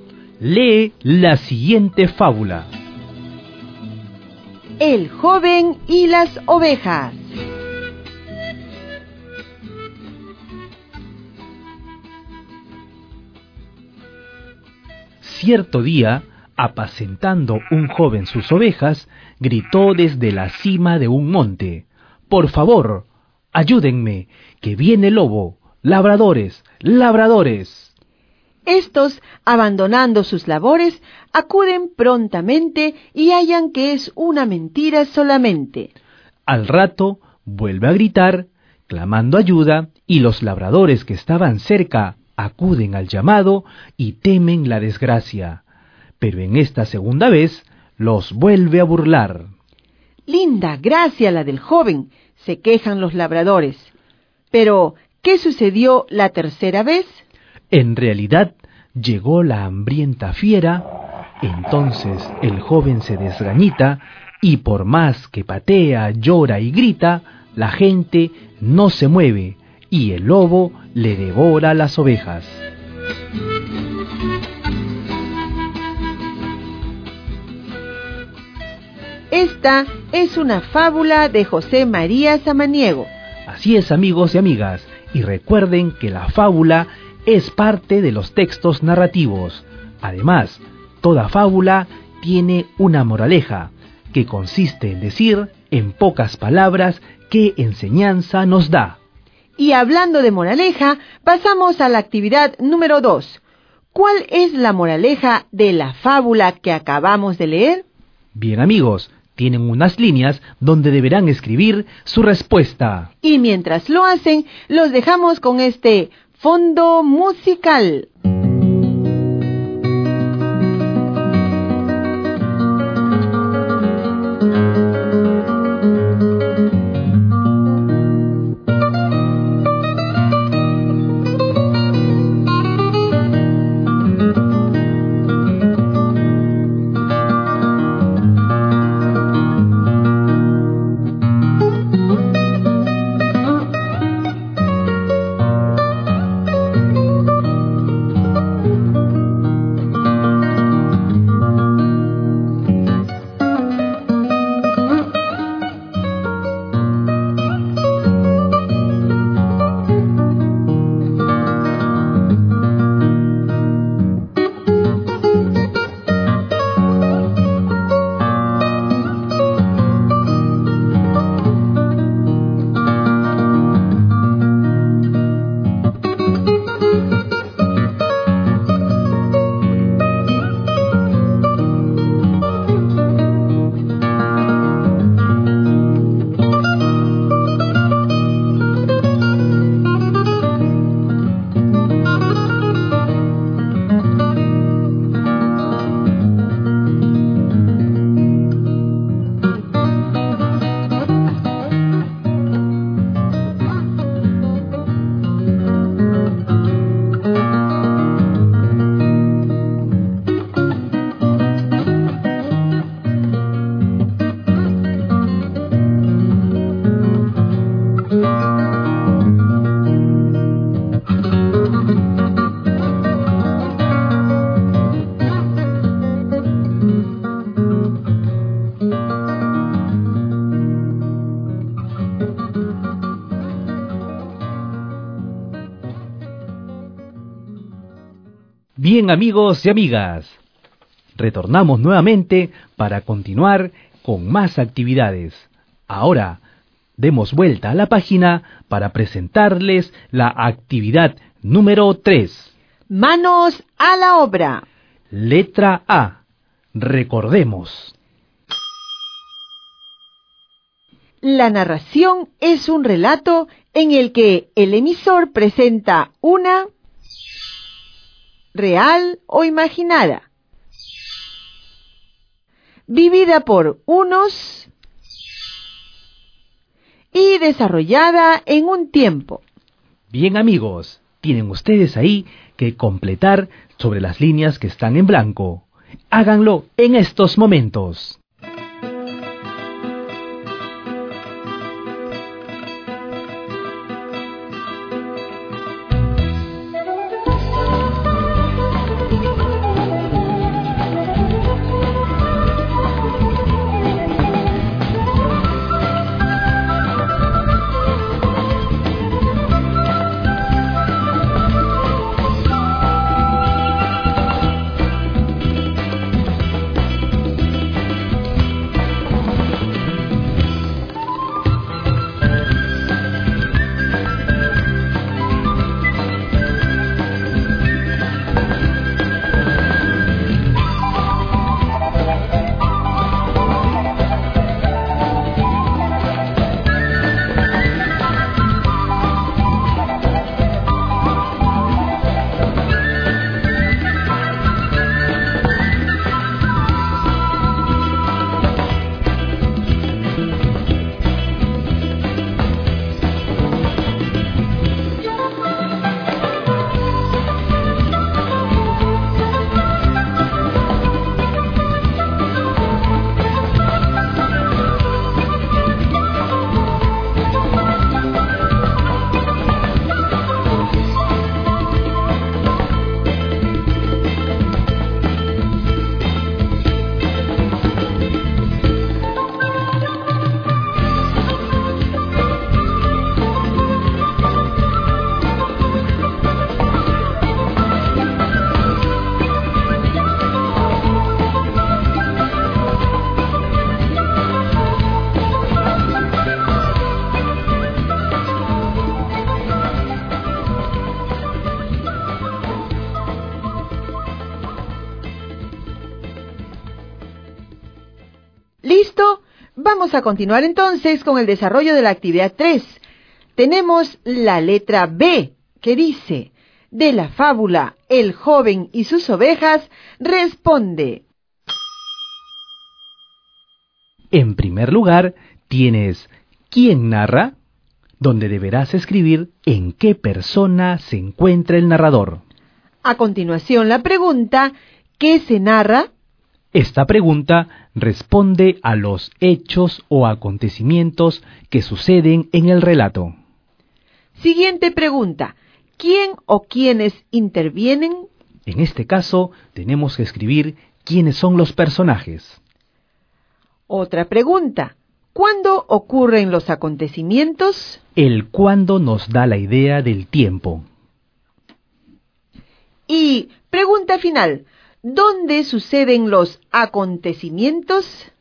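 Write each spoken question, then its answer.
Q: ¿Cuál es la moraleja de la fábula que acabamos de leer?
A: Si mientes, nadie te creerá aunque digas la verdad

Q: ¿quién narra?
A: en tercera persona

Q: ¿qué se narra?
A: Un joven engaña dos veces a los labradores gritando que viene el lobo; la tercera vez el lobo llega de verdad, nadie lo ayuda y el lobo devora sus ovejas

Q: ¿Quién o quiénes intervienen?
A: El joven, los labradores y el lobo (y las ovejas)

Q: ¿Dónde suceden los acontecimientos?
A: En el campo, en un monte donde el joven cuida sus ovejas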